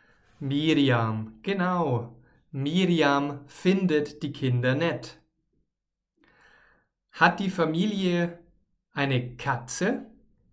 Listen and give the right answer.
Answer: Nein, nein, die Familie hat natürlich keine Katze, sondern einen Hund.